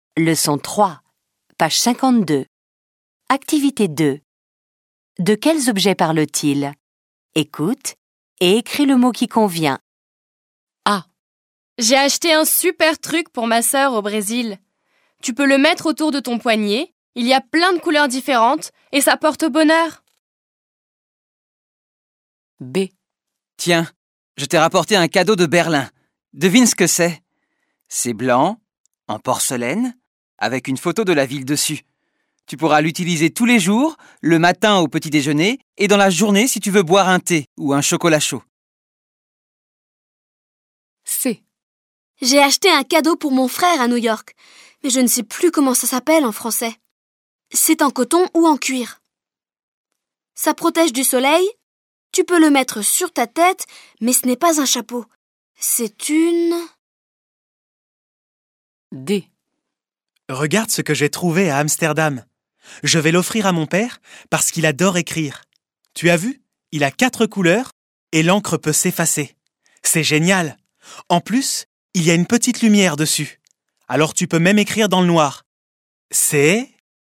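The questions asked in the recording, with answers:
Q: De quels objets parle-t-il?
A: un bracelet

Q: De quels objets parle-t-il?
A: une casquette

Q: De quels objets parle-t-il?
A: un stylo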